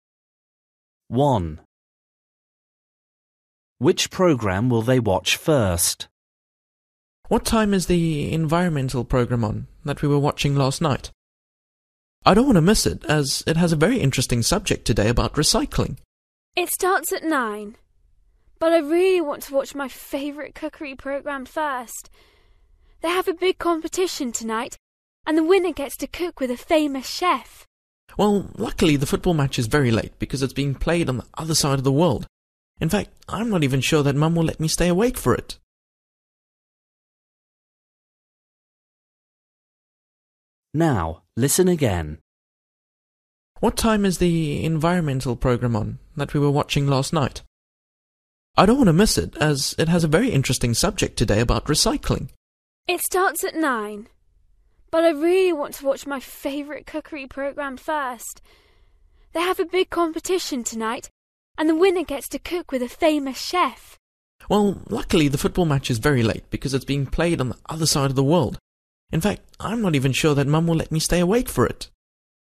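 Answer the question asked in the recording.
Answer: the cookery program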